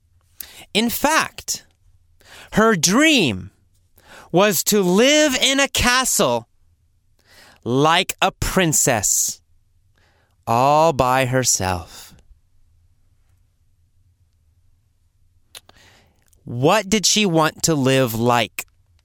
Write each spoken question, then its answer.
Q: What did she want to live like?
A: Like a princess. She wanted to live like a princess.